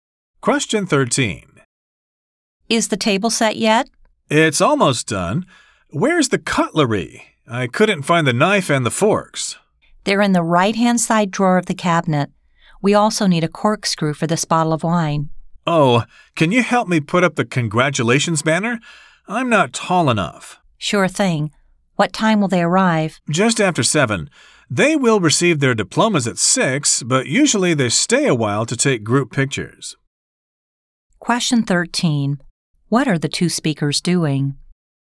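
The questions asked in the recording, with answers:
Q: What are the two speakers doing?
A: Getting ready for a graduation party (setting the table and putting up a banner)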